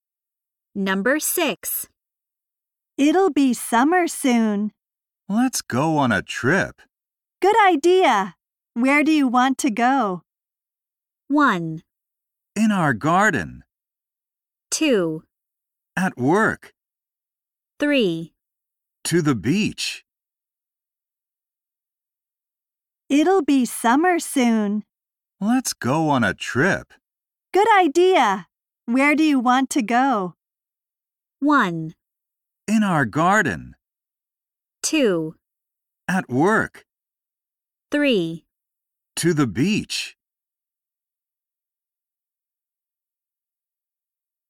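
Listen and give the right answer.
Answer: 3: To the beach.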